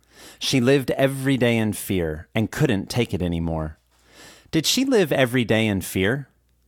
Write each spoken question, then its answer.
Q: Did she live every day in fear?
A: Yes, she lived every day in fear.